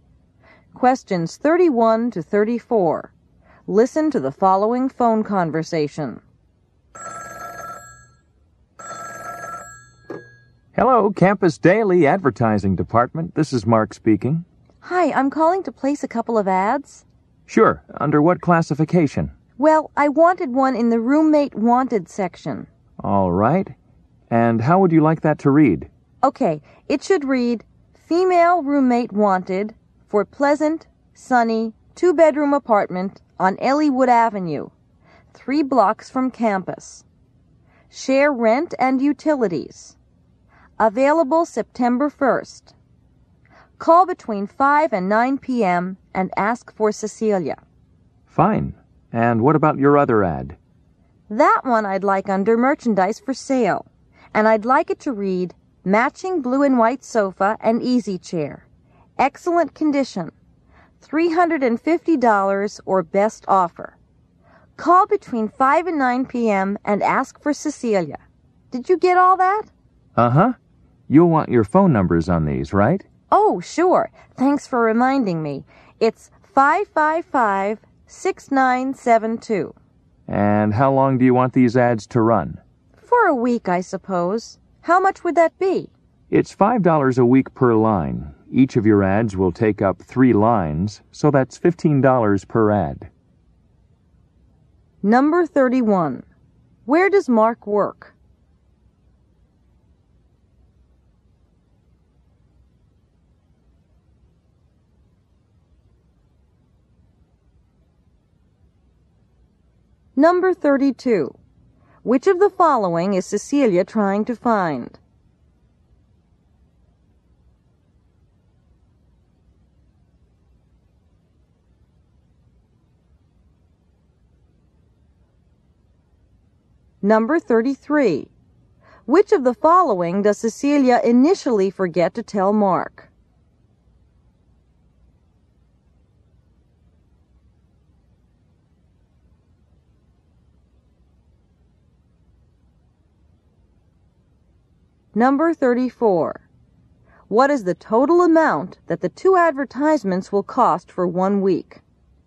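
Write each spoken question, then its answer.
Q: Where does Mark work?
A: At the Campus Daily newspaper's advertising department

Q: Which of the following is Cecilia trying to find?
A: A female roommate

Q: Which of the following does Cecilia initially forget to tell Mark?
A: Her phone number

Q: What is the total amount that the two advertisements will cost for 1 week?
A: $30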